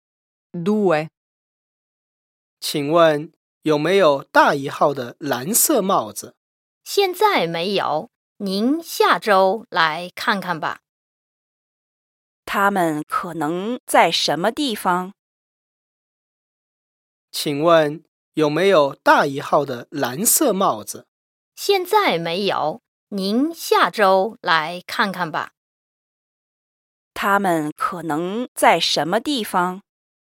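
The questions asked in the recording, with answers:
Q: 他们可能在什么地方?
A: 商店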